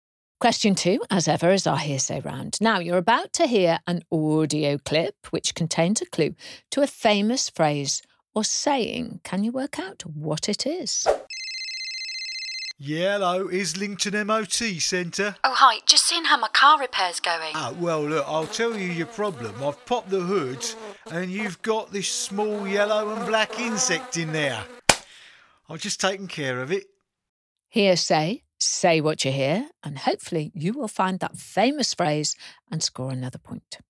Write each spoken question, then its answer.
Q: Can you work out what it is?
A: I was looking for bee in your bonnet.